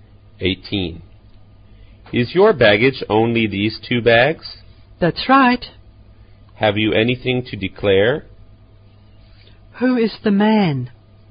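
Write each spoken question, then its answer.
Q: Who is the man?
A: A customs officer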